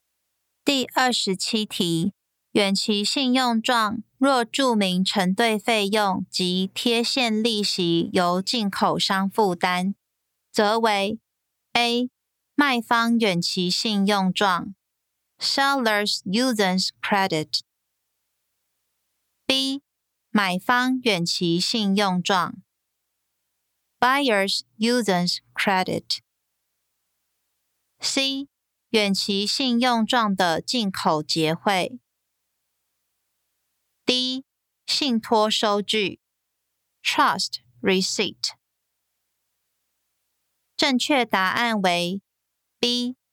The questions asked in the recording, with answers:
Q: 远期信用状若注明承兑费用及贴现利息由进口商负担,则为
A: 正确答案为 B.